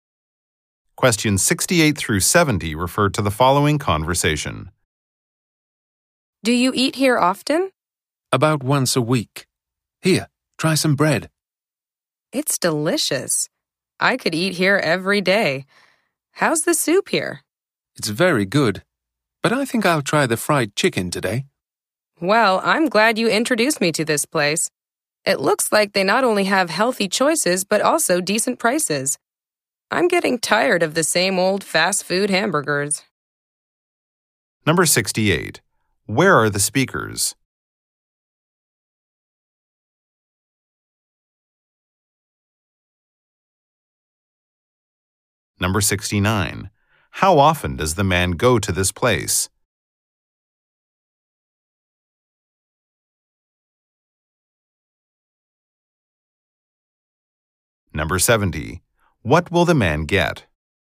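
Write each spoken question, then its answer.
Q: Where are the speakers?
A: At a restaurant

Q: How often does the man go to this place?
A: About once a week

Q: What will the man get?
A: Fried chicken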